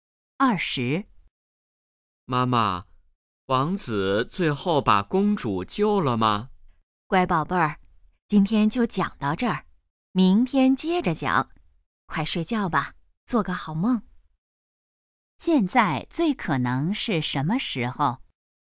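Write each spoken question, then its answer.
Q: 现在最可能是什么时候?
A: 晚上睡觉前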